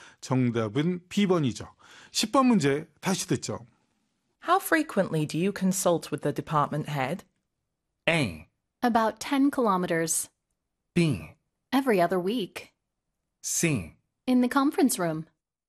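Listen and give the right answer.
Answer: B: Every other week.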